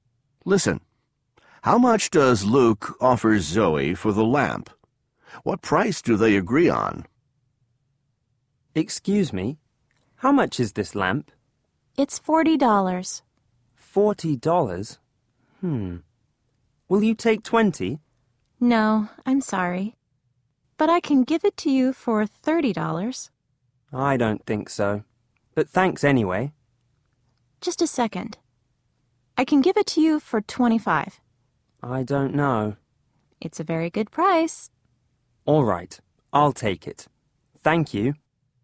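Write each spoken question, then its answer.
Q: How much does Luke offer Zoe for the lamp?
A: $20

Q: What price do they agree on?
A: $25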